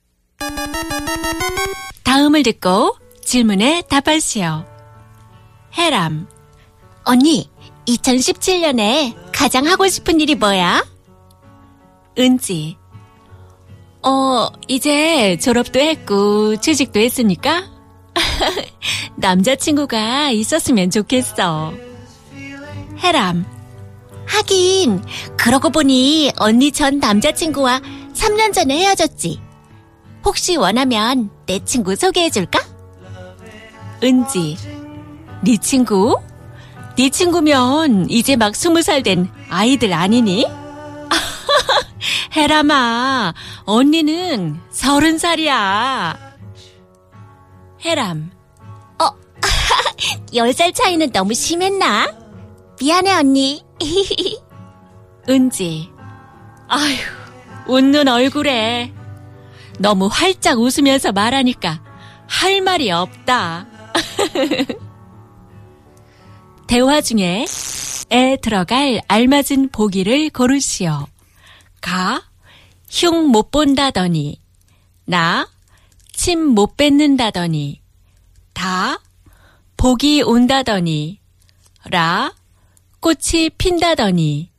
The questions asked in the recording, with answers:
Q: 대화 중에 에 들어갈 알맞은 보기를 고르시오.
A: 나 침 못 뱉는다더니, spit.